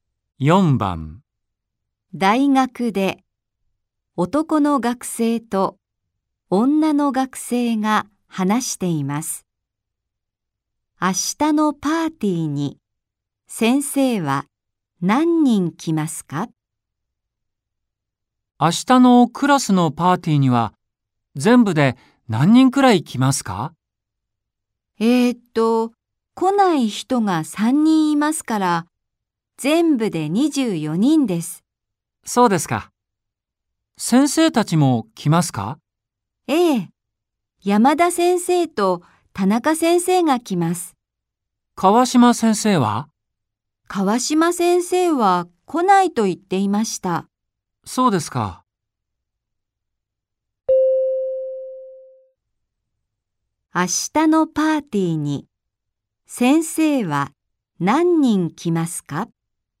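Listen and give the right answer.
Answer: 2人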